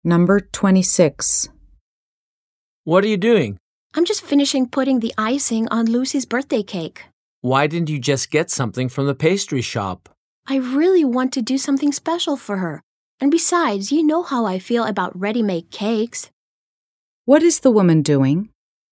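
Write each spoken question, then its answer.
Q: What is the woman doing?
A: Putting the icing on Lucy's birthday cake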